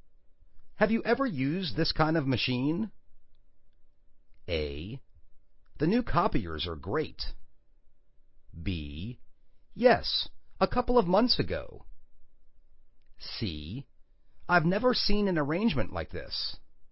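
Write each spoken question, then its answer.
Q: Have you ever used this kind of machine?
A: B: Yes, a couple of months ago.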